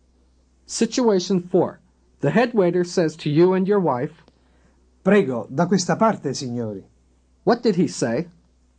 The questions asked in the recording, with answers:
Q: What did he say?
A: This way, please, sir, ma'am.